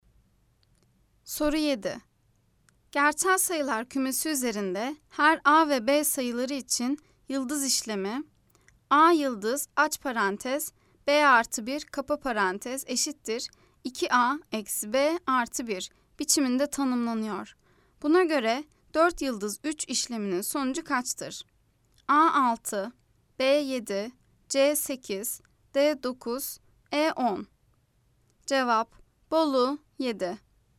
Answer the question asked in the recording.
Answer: Cevap, Bolu 7.